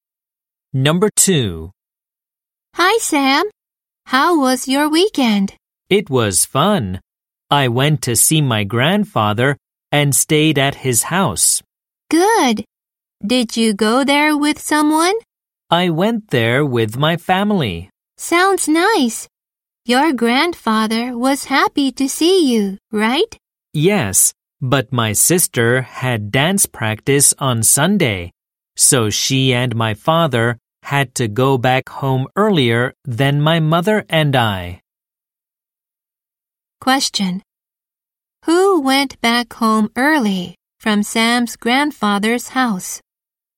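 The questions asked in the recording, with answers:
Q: Who went back home early from Sam's grandfather's house?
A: His sister and his father.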